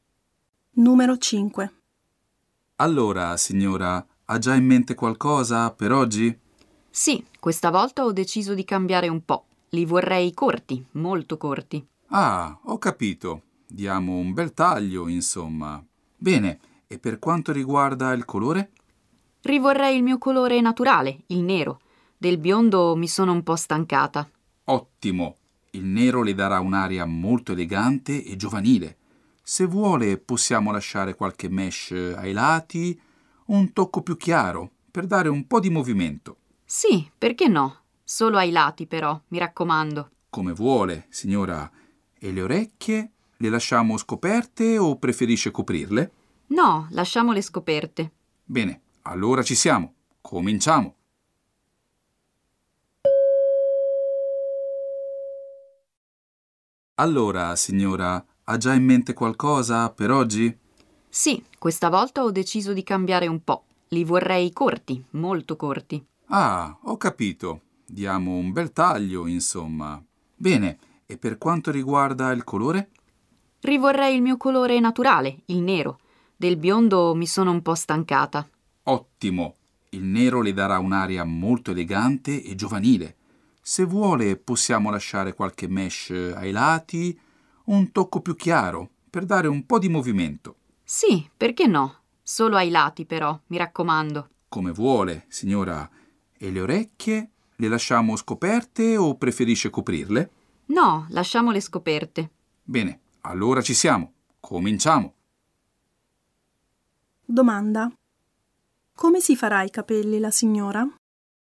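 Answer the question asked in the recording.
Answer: Molto corti, neri (colore naturale), con qualche mesh più chiara solo ai lati e orecchie scoperte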